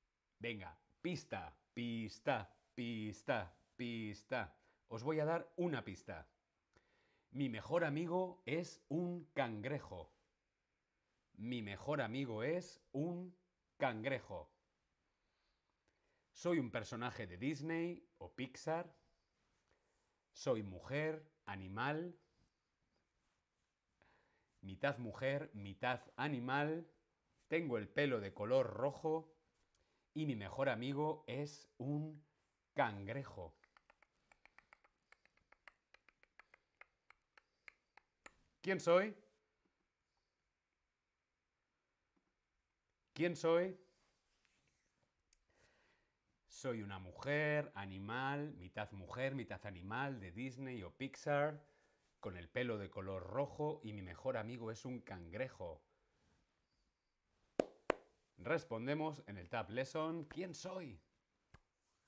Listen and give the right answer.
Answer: Ariel. La sirenita.